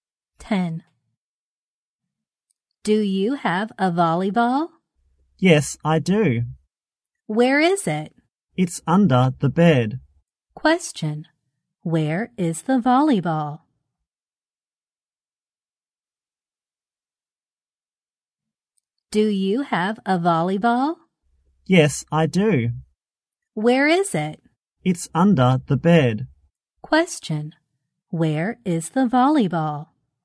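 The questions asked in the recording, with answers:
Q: Where is the volleyball?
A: Under the bed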